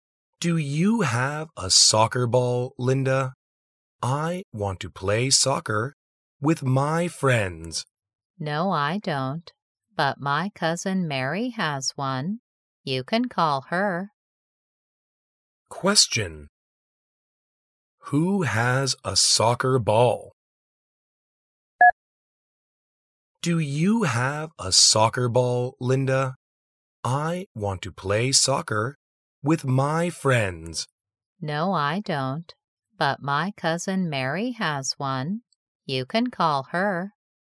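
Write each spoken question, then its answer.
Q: Who has a soccer ball?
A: Mary, Linda's cousin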